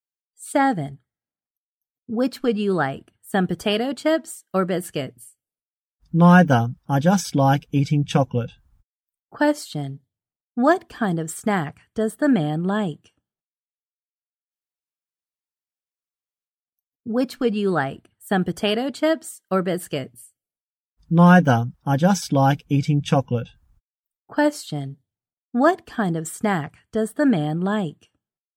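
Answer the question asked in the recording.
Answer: Chocolate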